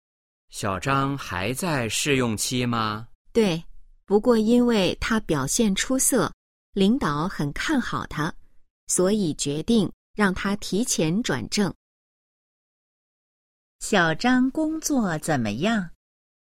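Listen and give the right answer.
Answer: 表现出色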